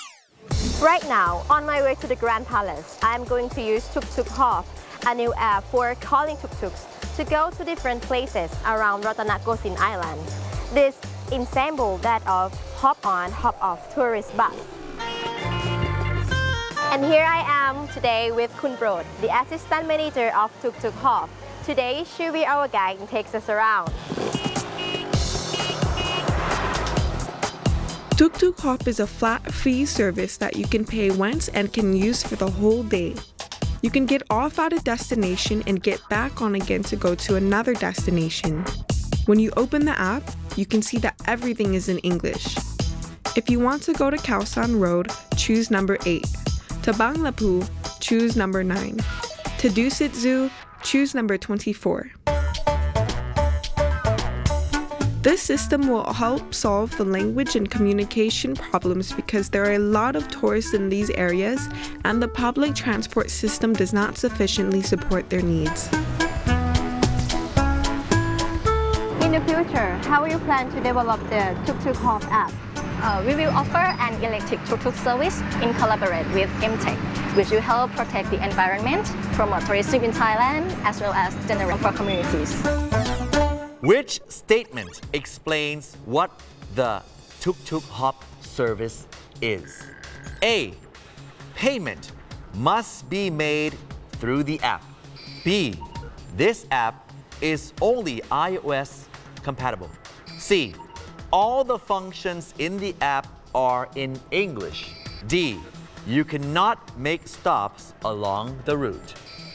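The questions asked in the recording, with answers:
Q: Which statement explains what the tuk-tuk hop service is?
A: C: All the functions in the app are in English.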